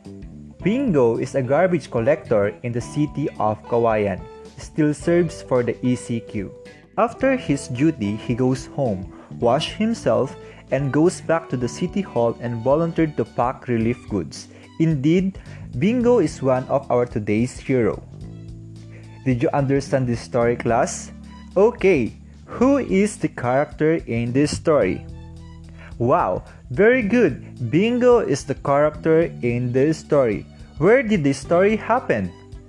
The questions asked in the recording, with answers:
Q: Where did the story happen?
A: The story happened at Kawayan City.